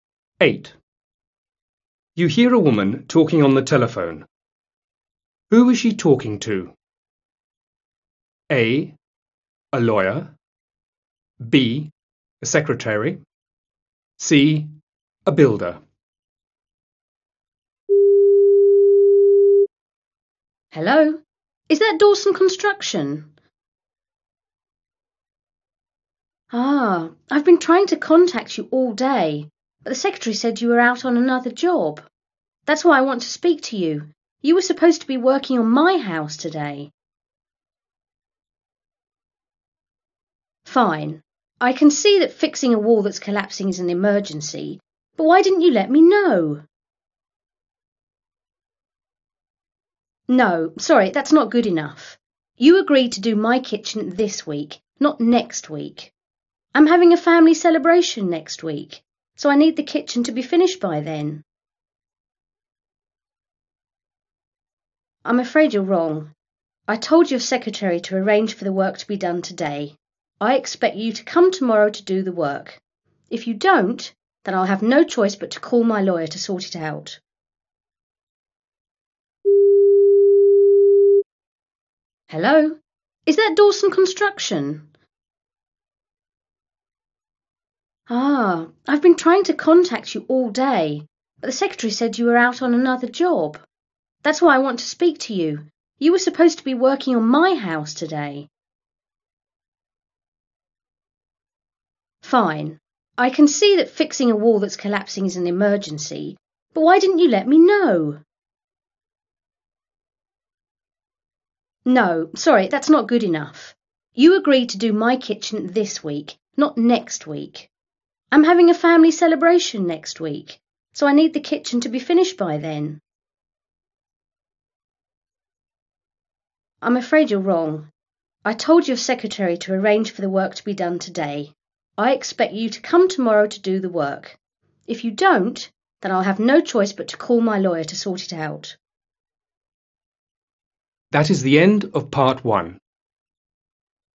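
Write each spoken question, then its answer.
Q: Who is she talking to?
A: C: A builder.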